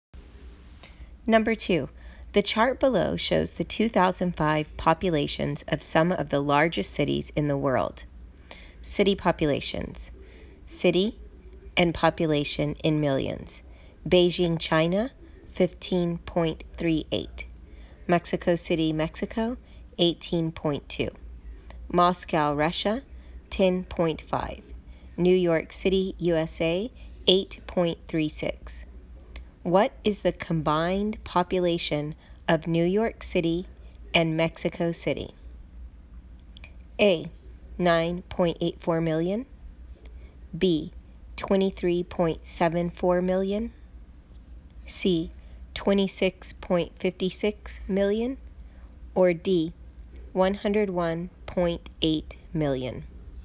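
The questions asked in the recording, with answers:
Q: What is the combined population of New York City and Mexico City?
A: C: 26.56 million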